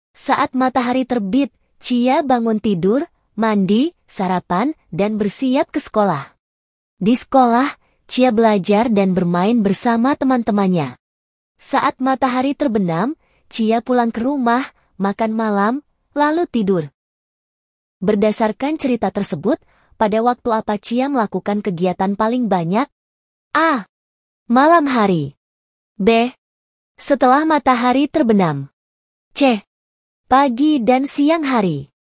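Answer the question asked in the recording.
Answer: C: Pagi dan siang hari.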